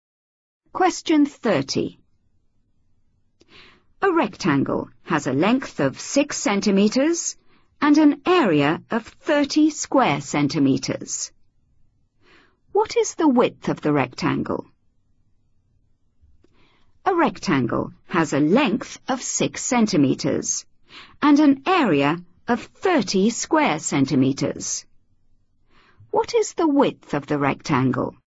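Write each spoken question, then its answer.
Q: What is the width of the rectangle?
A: 5 centimetres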